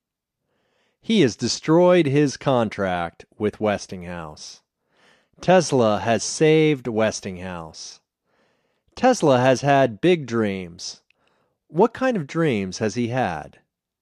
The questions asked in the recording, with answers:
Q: What kind of dreams has he had?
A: He has had big dreams.